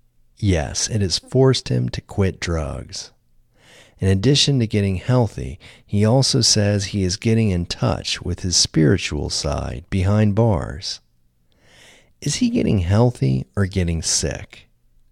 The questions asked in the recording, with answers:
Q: Is he getting healthy or getting sick?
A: He is getting healthy.